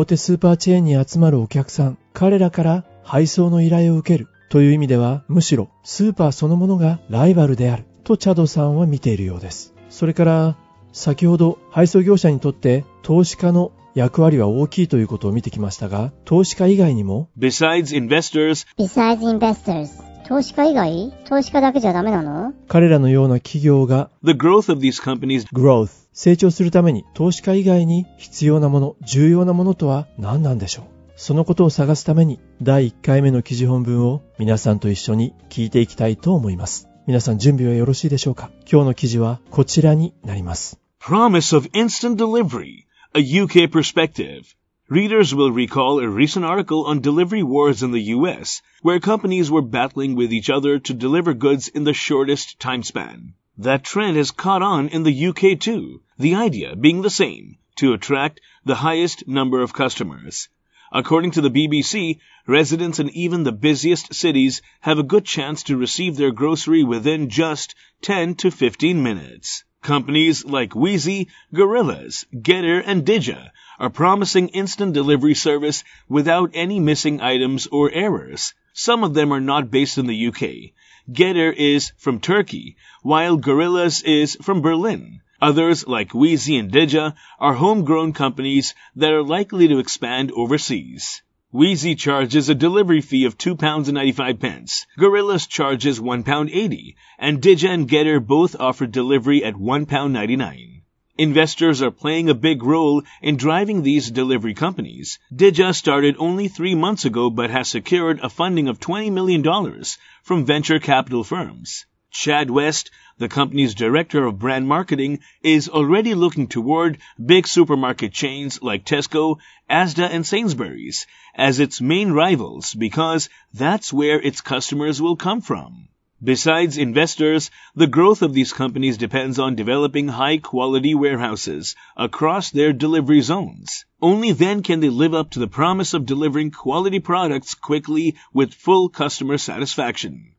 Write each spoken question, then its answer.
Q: Growth 成長するために投資家以外に必要なもの、重要なものとは何なんでしょう?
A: The growth of these companies depends on developing high quality warehouses across their delivery zones.